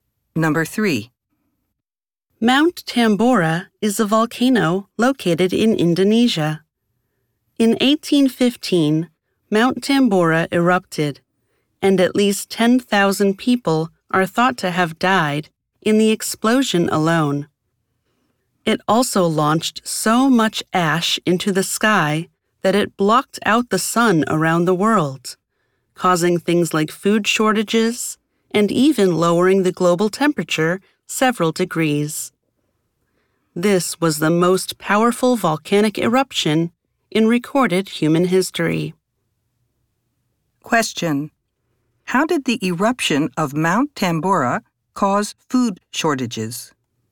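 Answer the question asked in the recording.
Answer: It launched so much ash into the sky that it blocked out the sun around the world.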